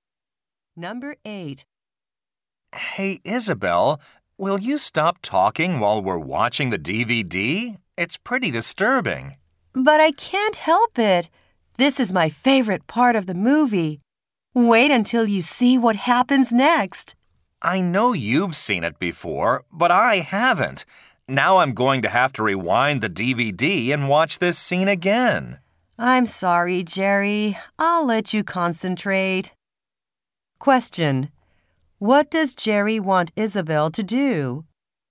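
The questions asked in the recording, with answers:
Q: What does Jerry want Isabel to do?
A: Stop talking while they watch the DVD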